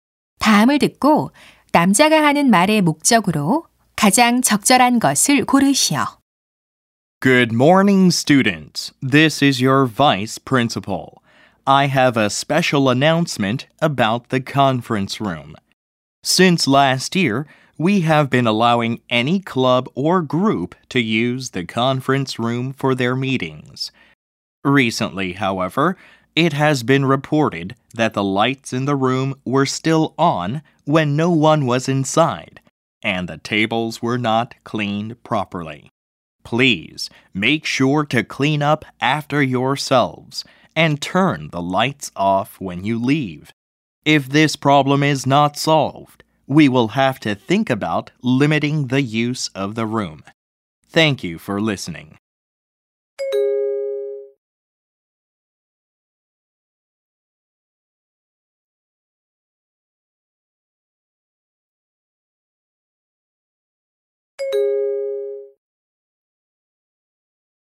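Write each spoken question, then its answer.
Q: 다음을 듣고 남자가 하는 말의 목적으로 가장 적절한 것을 고르시오.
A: 회의실 사용 후 정리하고 불을 끄도록 당부하려고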